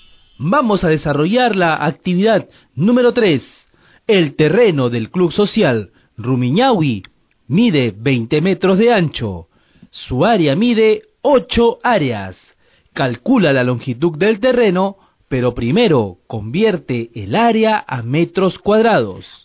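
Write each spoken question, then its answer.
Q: Calcula la longitud del terreno, pero primero convierte el área a metros cuadrados.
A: 40 metros (8 áreas = 800 m2)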